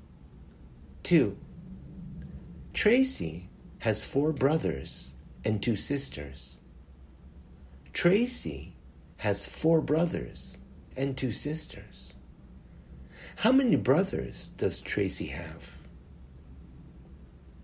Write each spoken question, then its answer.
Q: How many brothers does Tracy have?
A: Tracy has 4 brothers.